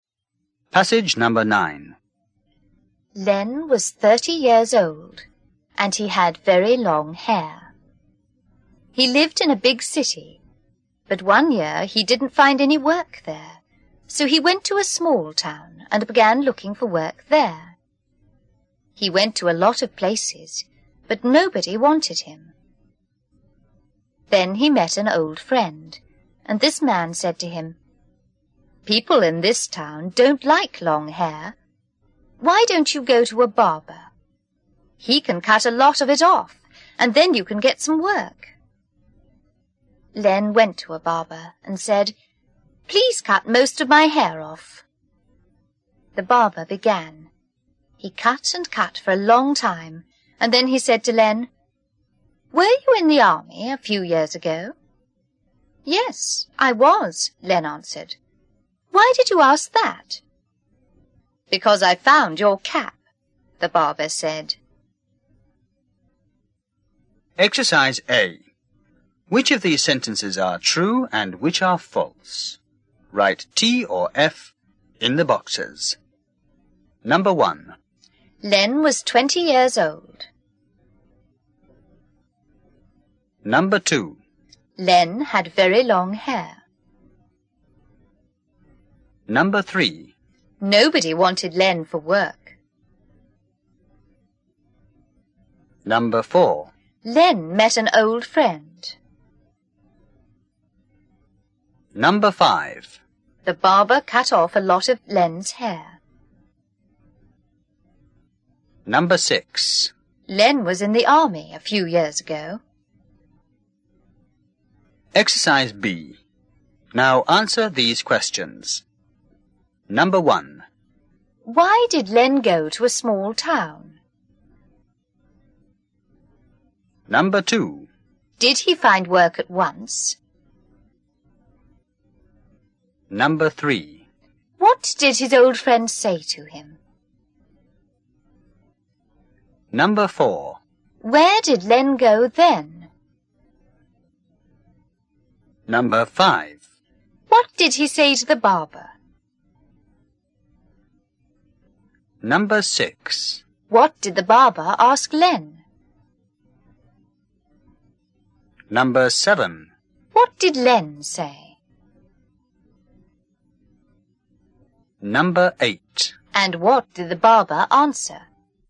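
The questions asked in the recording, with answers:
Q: Why did Len go to a small town?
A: He didn't find any work in the big city.

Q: Did he find work at once?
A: No, nobody wanted him.

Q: What did his old friend say to him?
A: People in this town don't like long hair; go to a barber.

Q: Where did Len go then?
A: To a barber.

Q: What did he say to the barber?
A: Please cut most of my hair off.

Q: What did the barber ask Len?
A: Were you in the army a few years ago?

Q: What did Len say?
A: Yes, I was. Why did you ask that?

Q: And what did the barber answer?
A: Because I found your cap.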